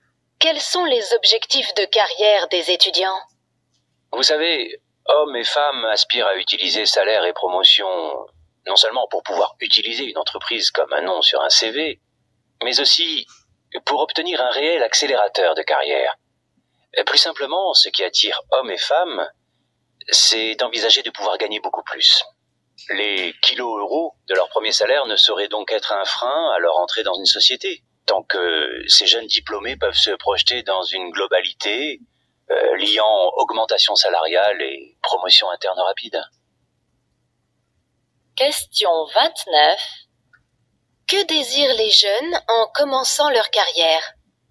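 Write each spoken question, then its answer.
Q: Que désirent les jeunes en commençant leur carrière ?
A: Une évolution rapide : augmentation de salaire et promotion interne rapide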